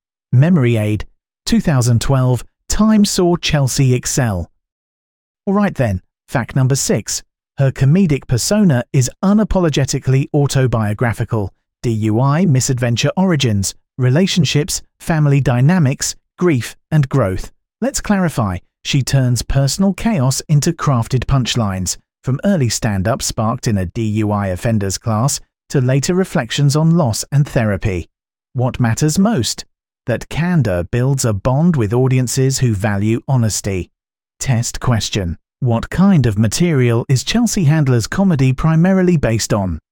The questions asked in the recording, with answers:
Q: What kind of material is Chelsea Handler's comedy primarily based on?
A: Autobiographical